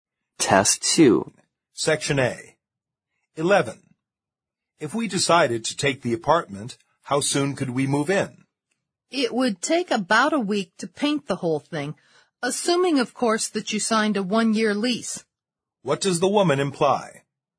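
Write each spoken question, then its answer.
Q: What does the woman imply?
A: They could move in in about a week, if they sign a one-year lease.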